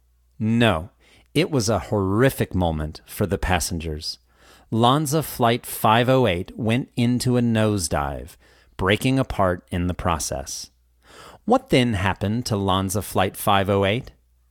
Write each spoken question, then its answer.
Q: What then happened to Lanza Flight 508?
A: It went into a nosedive, breaking apart in the process.